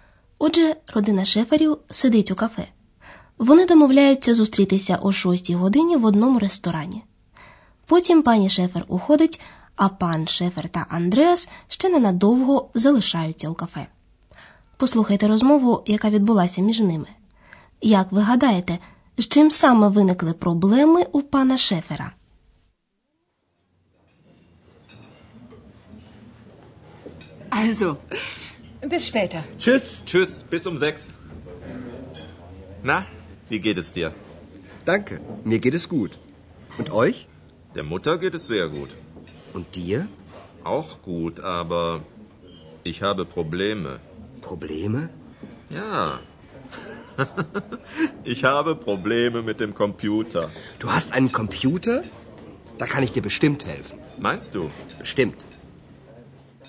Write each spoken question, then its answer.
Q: Як ви гадаєте, з чим саме виникли проблеми у пана Шефера?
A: Отже, пан Шефер має проблеми з комп'ютером.